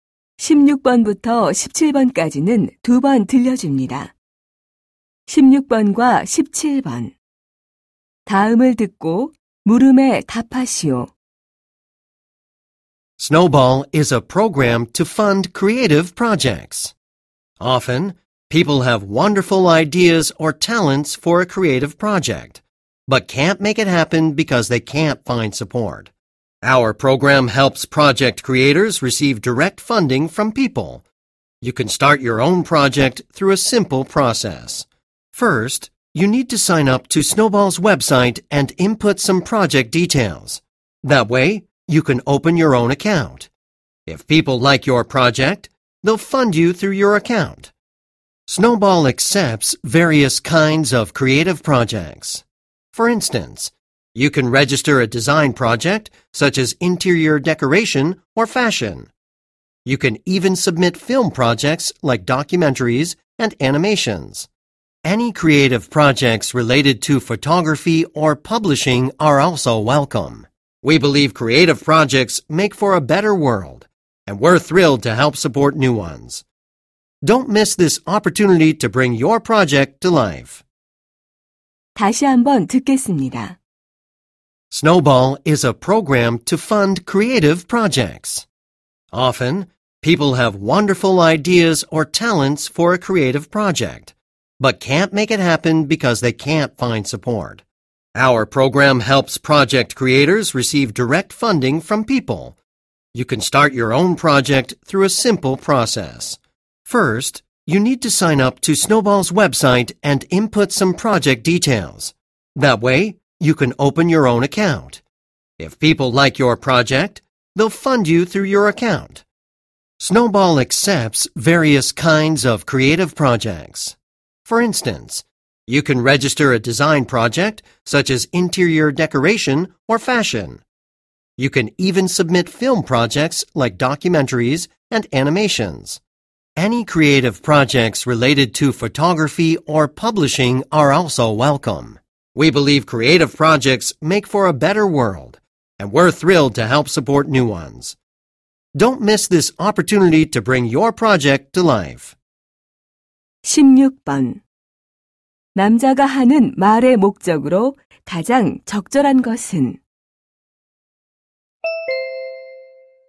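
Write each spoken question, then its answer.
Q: 남자가 하는 말의 목적으로 가장 적절한 것은?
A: 창작 프로젝트 후원 프로그램을 홍보하려고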